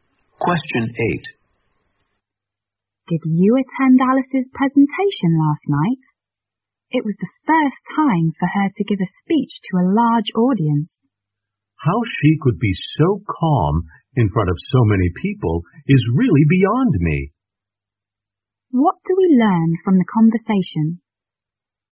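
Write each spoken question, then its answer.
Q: What do we learn from the conversation?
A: Alice was surprisingly calm giving her first speech to a large audience.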